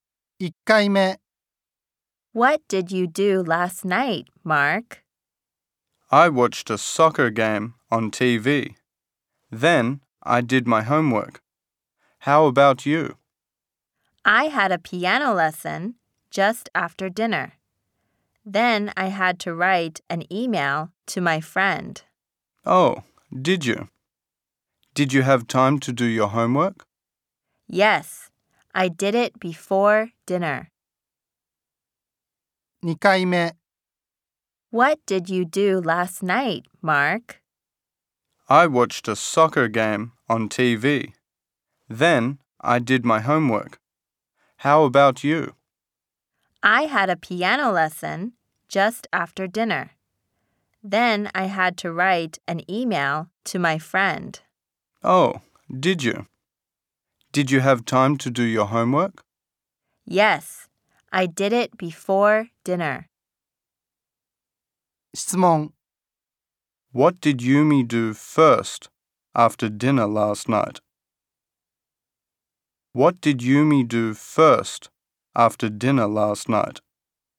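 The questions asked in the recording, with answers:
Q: What did Yumi do first after dinner last night?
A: She had a piano lesson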